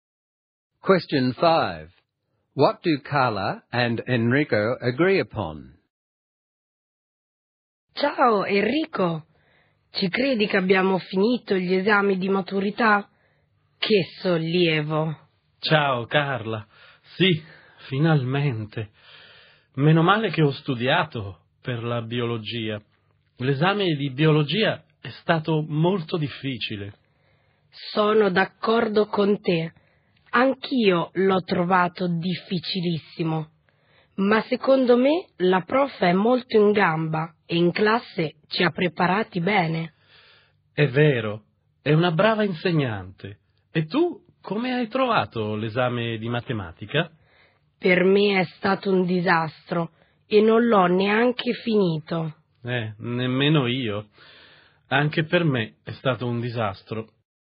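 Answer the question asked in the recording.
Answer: The biology exam was very difficult but the teacher prepared them well, and the maths exam was a disaster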